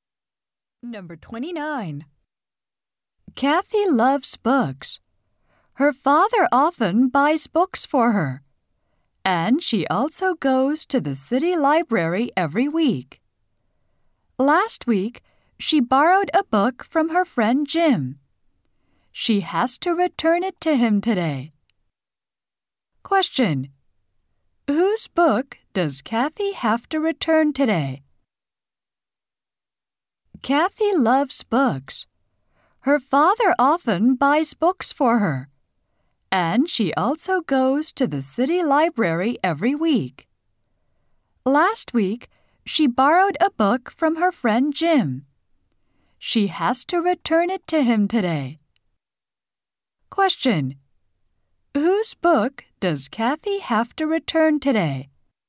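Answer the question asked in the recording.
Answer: Jim's.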